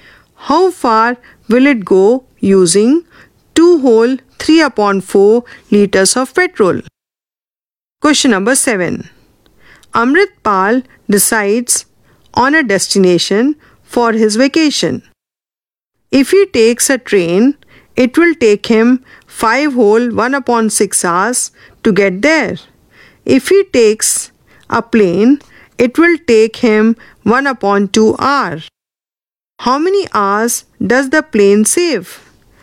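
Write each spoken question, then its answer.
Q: How many hours does the plane save?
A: 4 2/3 hours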